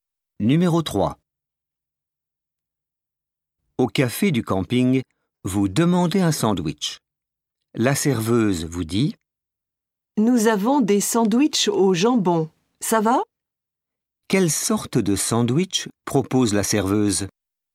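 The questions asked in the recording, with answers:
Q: Quelle sorte de sandwich propose la serveuse?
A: Au jambon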